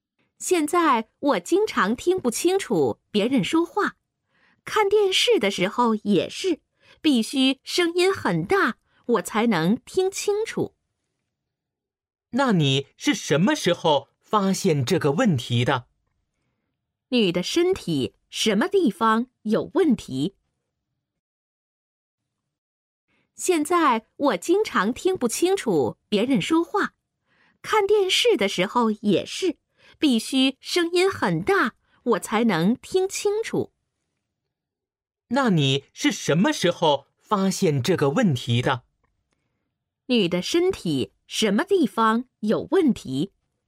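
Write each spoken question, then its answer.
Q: 女的身体什么地方有问题?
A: 耳朵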